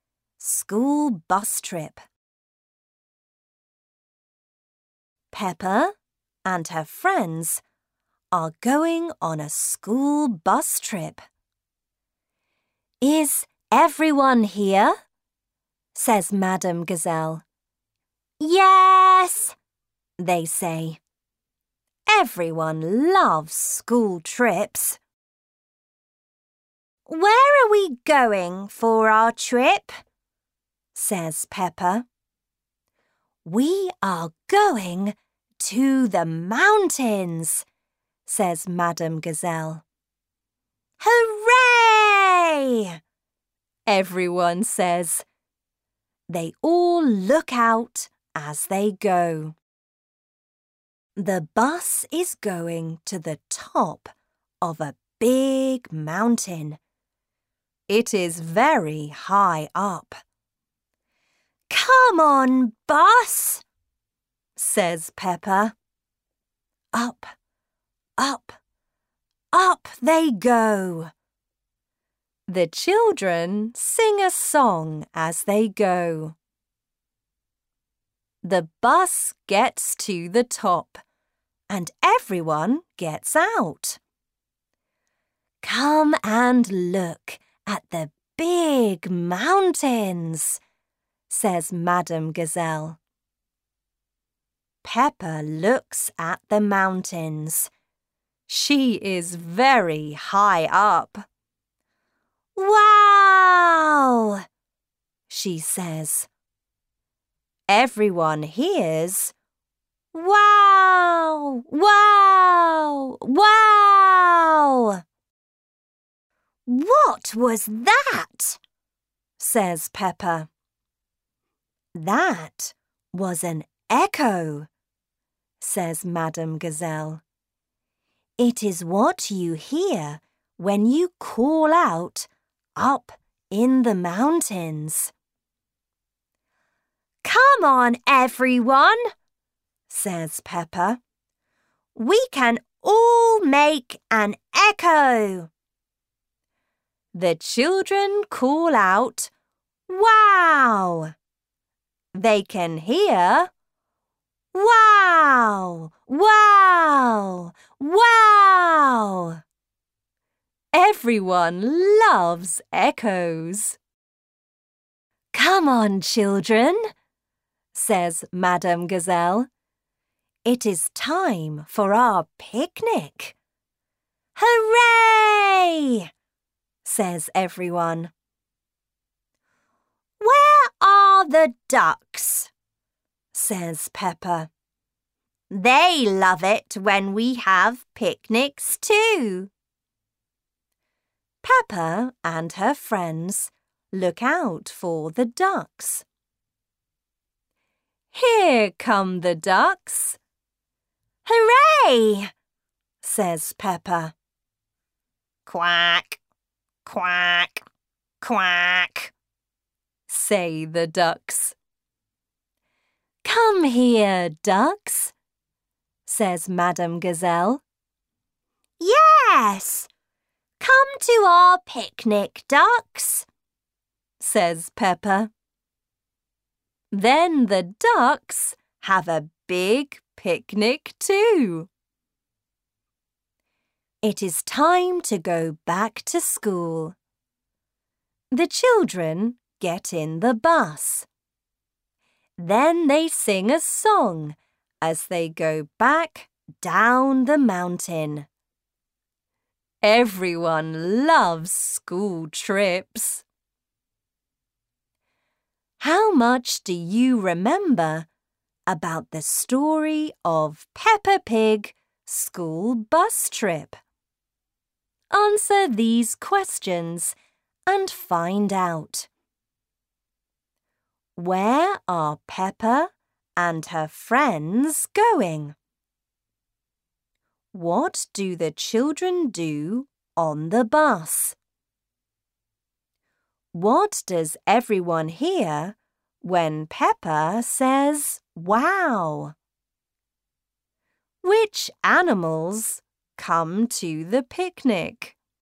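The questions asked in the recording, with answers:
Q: Where are Peppa and her friends going?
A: To the mountains

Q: What do the children do on the bus?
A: They sing a song

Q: What does everyone hear when Peppa says Wow!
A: An echo: wow, wow, wow

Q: Which animals come to the picnic?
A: The ducks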